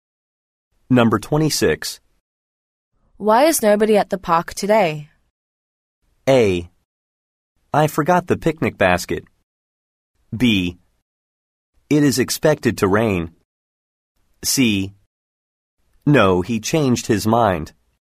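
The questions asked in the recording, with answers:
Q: Why is nobody at the park today?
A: B: It is expected to rain.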